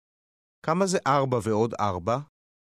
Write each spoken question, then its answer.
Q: כמה זה 4 ועוד 4?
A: 8. 8.